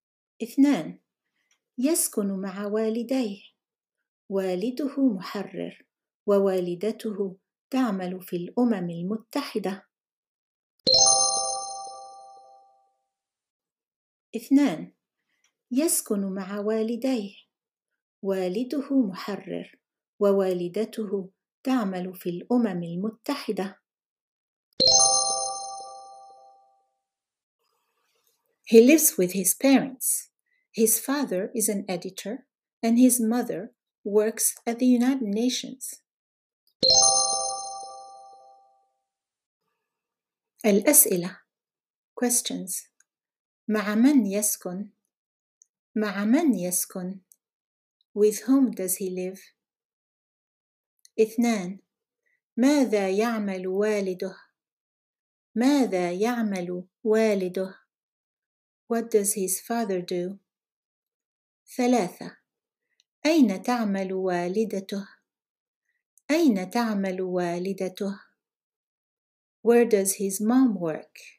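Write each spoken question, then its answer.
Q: مع من يسكن؟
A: مع والديه

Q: ماذا يعمل والده؟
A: محرر

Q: أين تعمل والدته؟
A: في الأمم المتحدة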